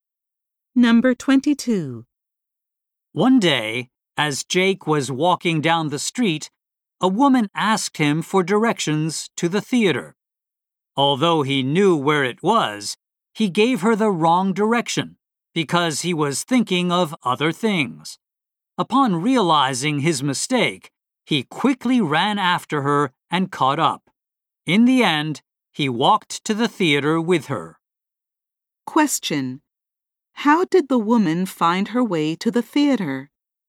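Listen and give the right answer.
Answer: Jake walked to the theater with her.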